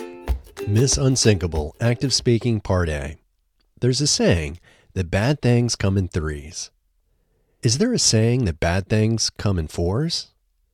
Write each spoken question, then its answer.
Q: Is there a saying that bad things come in fours?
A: No, there isn't a saying that bad things come in fours.